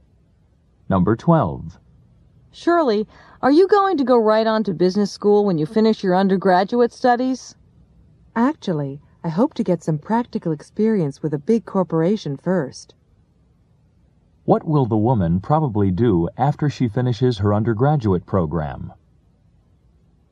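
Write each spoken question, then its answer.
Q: What will the woman probably do after she finishes her undergraduate program?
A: Work for a big corporation to get practical experience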